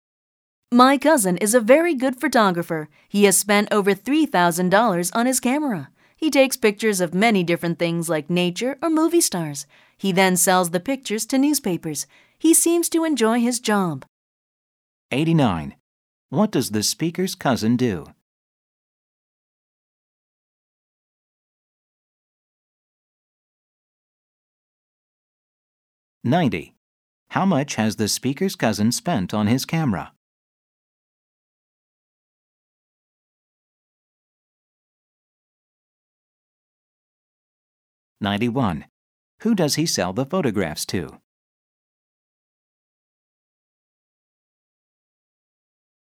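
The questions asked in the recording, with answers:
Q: What does the speaker's cousin do?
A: He is a photographer

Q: How much has the speaker's cousin spent on his camera?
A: Over $3,000

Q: Who does he sell the photographs to?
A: Newspapers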